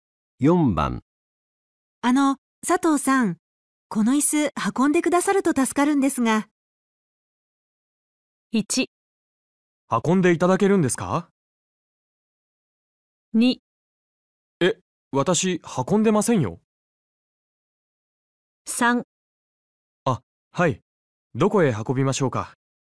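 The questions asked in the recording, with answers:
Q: あの、佐藤さん、この椅子運んでくださると助かるんですが。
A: 3: あ、はい。どこへ運びましょうか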